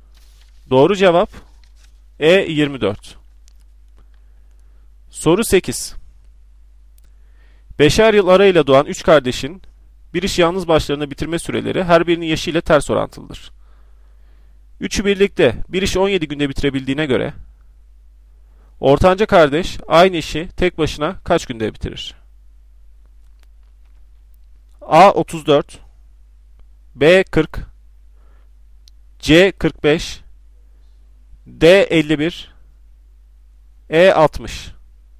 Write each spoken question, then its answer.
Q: Üçü birlikte bir iş 17 günde bitirebildiğine göre ortanca kardeş aynı işi tek başına kaç günde bitirir?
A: Doğru cevap D 51.